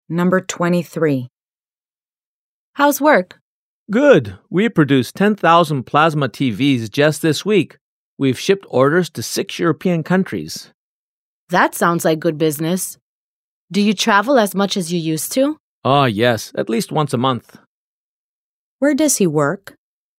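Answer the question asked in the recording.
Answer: At a factory that makes plasma TVs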